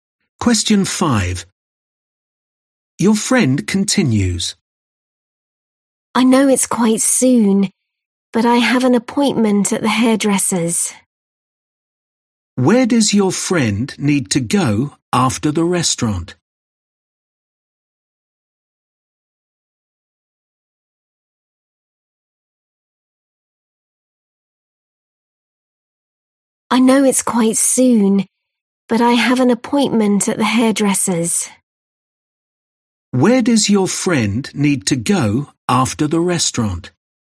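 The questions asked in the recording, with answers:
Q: Where does your friend need to go after the restaurant?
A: The hairdresser's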